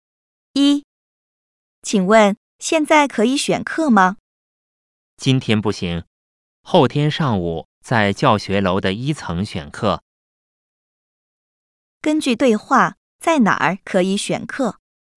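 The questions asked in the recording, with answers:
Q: 根据对话,在哪儿可以选课?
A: 教学楼的一层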